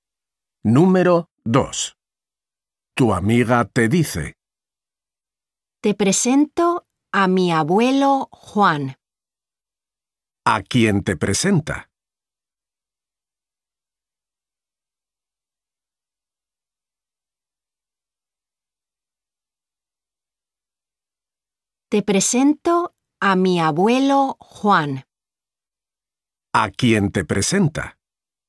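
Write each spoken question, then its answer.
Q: ¿A quién te presenta?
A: a su abuelo Juan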